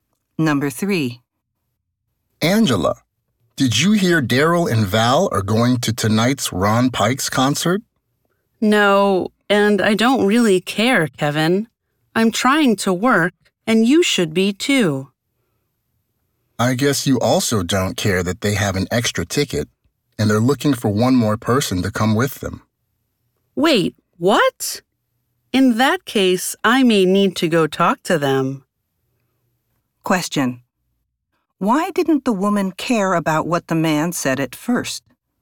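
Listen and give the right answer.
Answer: She was trying to work.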